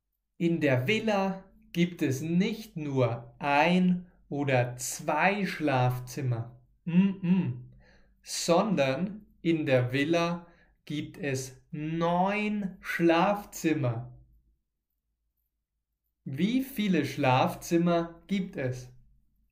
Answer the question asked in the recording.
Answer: Neun. Es gibt neun Schlafzimmer.